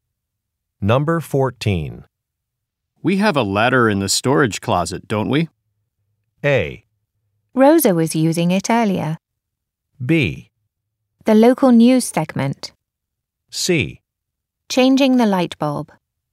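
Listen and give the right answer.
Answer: A: Rosa was using it earlier.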